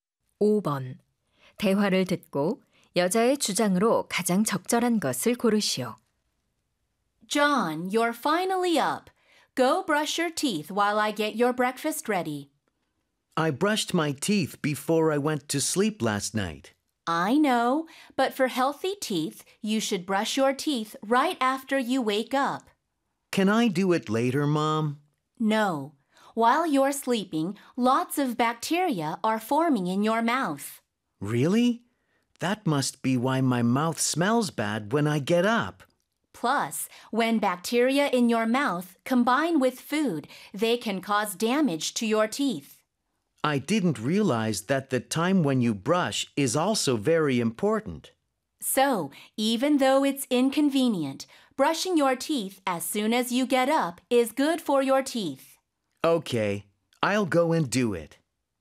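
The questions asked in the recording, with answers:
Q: 대화를 듣고 여자의 주장으로 가장 적절한 것을 고르시오.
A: 일어나자마자 양치질을 하는 것이 치아 건강에 좋다.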